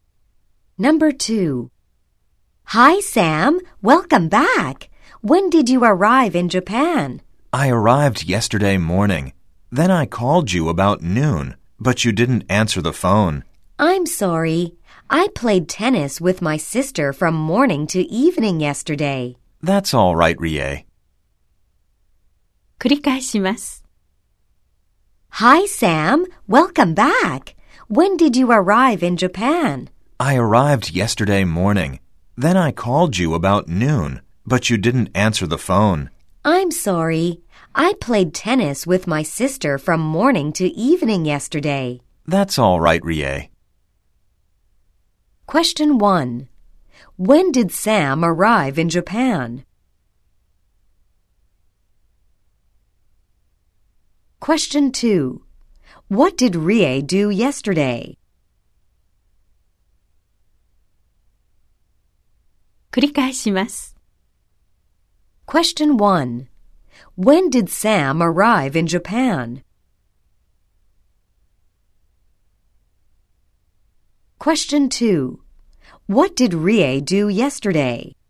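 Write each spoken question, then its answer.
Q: When did Sam arrive in Japan?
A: Yesterday morning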